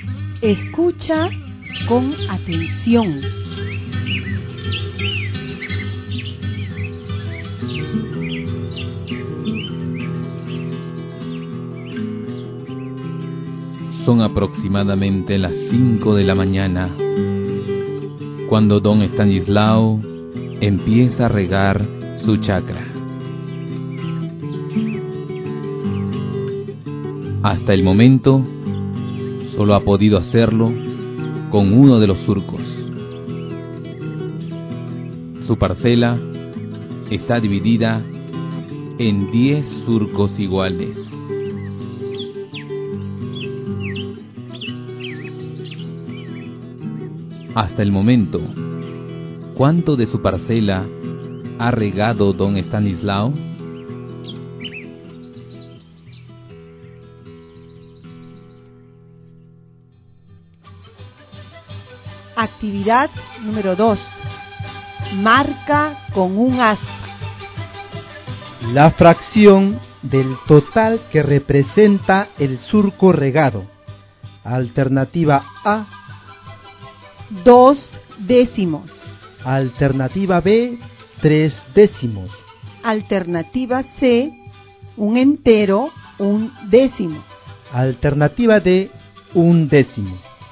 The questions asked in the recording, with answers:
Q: Hasta el momento, ¿cuánto de su parcela ha regado don Estanislao?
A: Bueno, es la alternativa D la que he marcado.